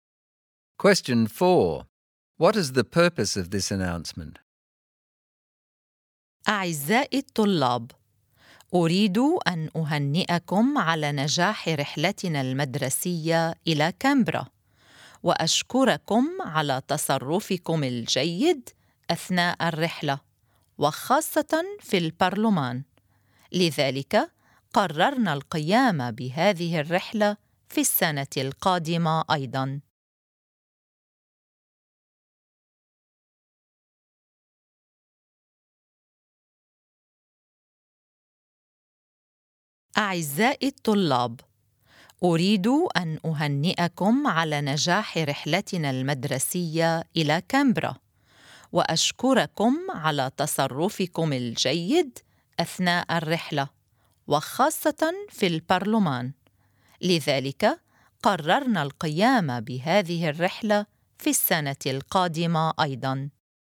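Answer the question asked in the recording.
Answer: To congratulate and thank students for the successful school trip to Canberra and their good behaviour, and to say the trip will happen again next year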